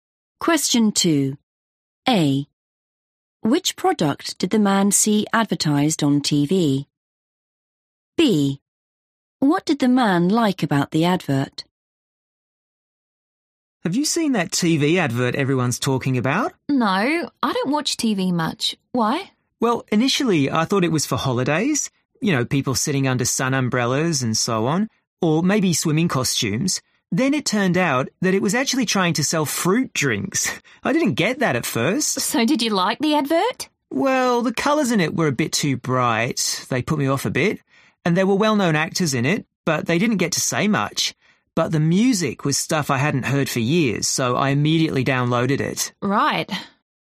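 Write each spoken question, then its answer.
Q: Which product did the man see advertised on TV?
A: fruit drinks

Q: What did the man like about the advert?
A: the music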